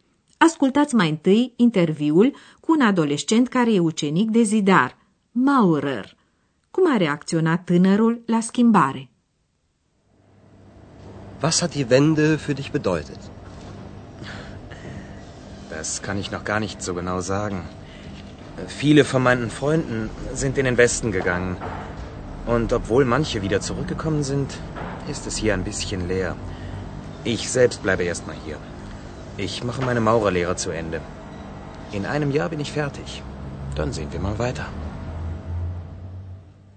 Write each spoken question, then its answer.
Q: Cum a reacționat tânărul la schimbare?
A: Tânărul nu prea știe ce să spună pentru că nu poate aprecia încă exact ce înseamnă schimbarea pentru el.